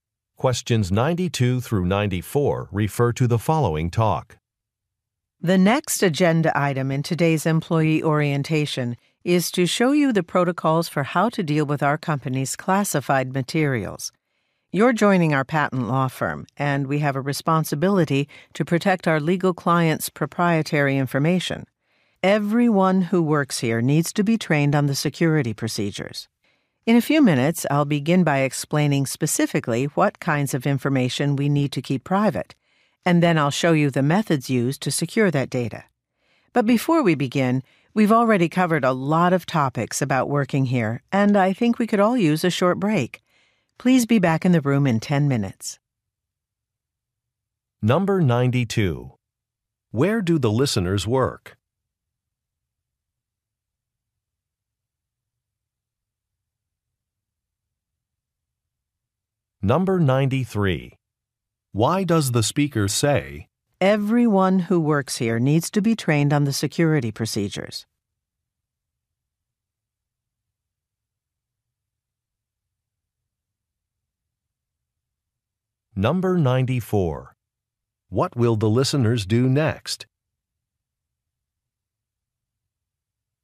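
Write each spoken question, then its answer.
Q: Where do the listeners work?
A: At a patent law firm

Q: What will the listeners do next?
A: Take a short break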